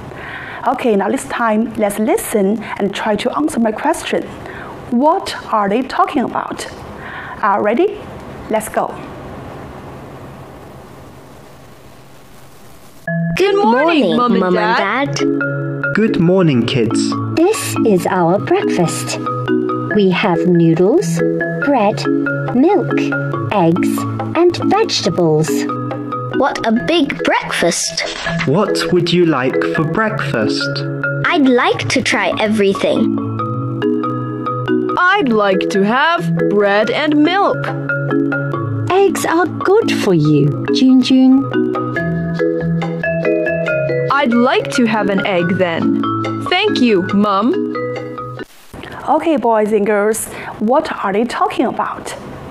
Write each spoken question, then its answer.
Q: What are they talking about?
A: Yes, they're talking about breakfast.